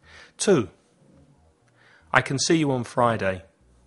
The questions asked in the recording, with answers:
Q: I can see you on Friday.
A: Can, positive.